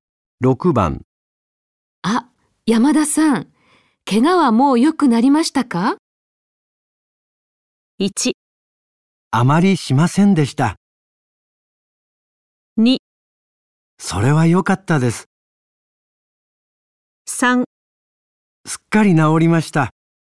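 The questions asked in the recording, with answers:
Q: あ、山田さん、怪我はもう良くなりましたか?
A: 3: すっかり治りました。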